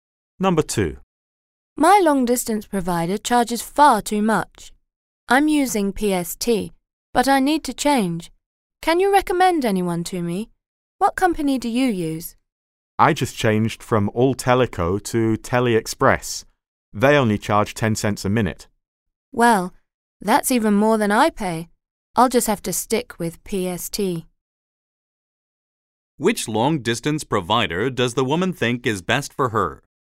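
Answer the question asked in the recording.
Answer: PST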